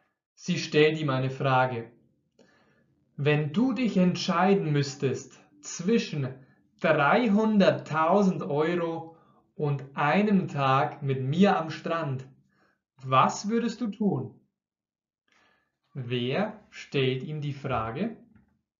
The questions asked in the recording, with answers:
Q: Wer stellt ihm die Frage?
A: Heidi. Heidi stellt ihm die Frage.